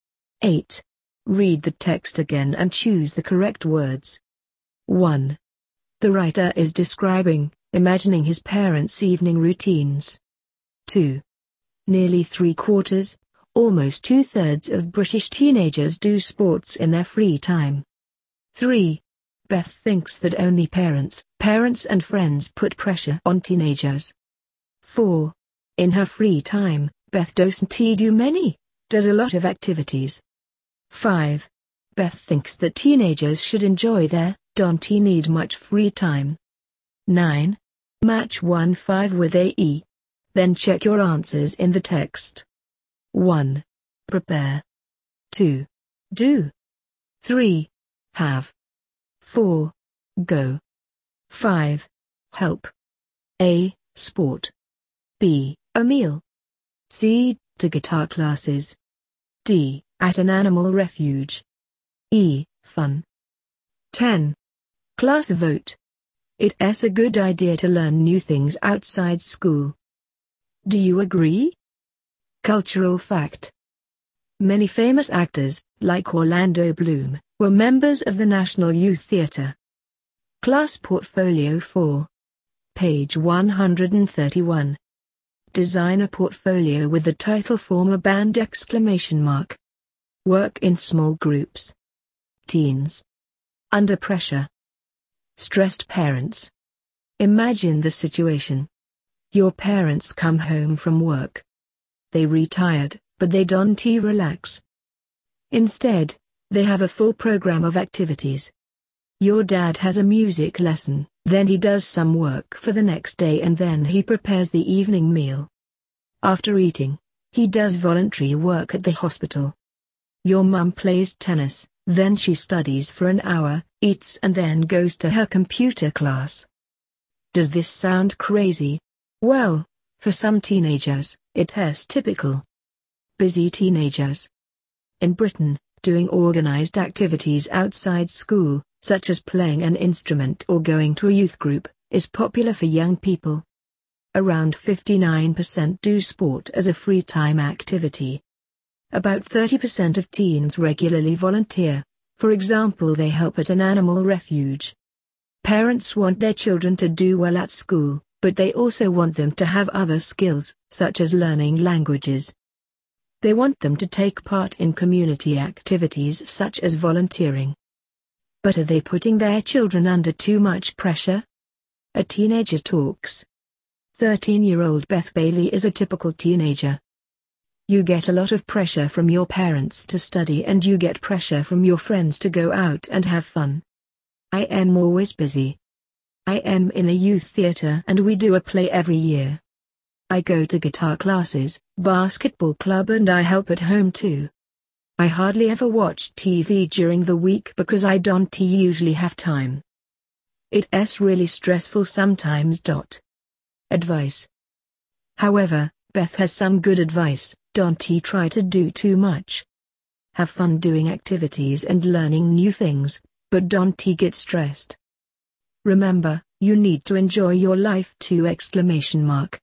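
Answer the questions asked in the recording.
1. imagining
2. almost two-thirds
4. does a lot of
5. should enjoy their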